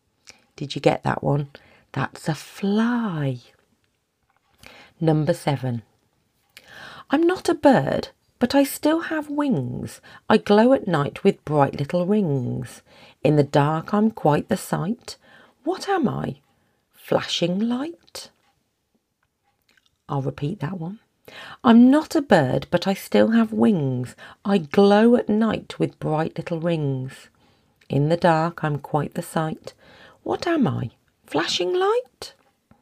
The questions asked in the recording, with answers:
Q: What am I? Flashing light?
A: It is, of course, a firefly.